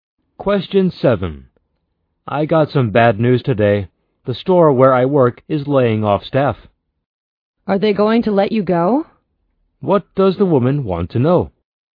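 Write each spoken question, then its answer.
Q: What does the woman want to know?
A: Whether the man will lose his job.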